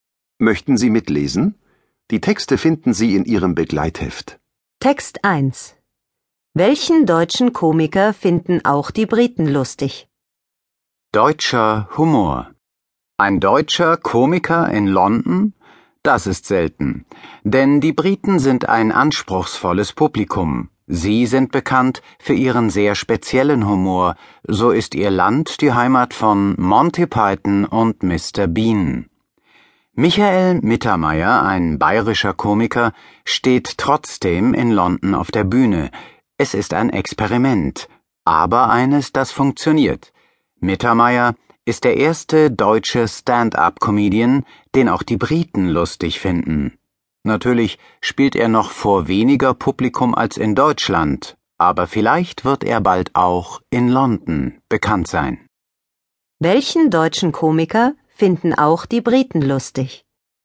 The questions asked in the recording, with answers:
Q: Welchen deutschen Komiker finden auch die Briten lustig.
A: Sie finden Michael Mittermeier lustig.